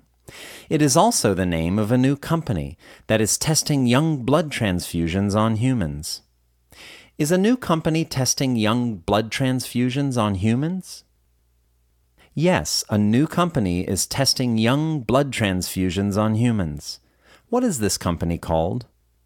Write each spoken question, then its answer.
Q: What is this company called?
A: This company is called Ambrosia.